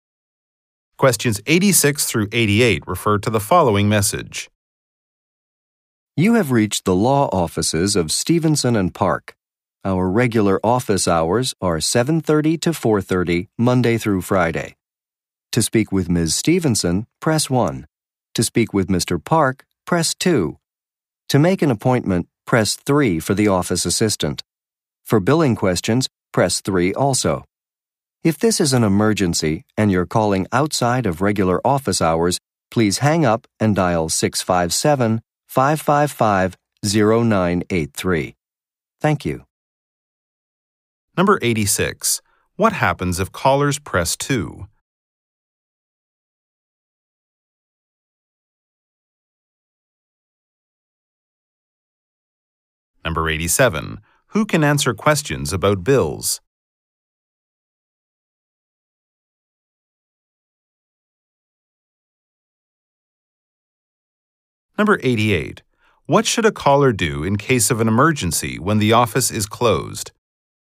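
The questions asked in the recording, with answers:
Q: What happens if callers press 2?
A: They can speak with Mr. Park.

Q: Who can answer questions about bills?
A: The office assistant.

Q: What should a caller do in case of an emergency when the office is closed?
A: Hang up and dial another number.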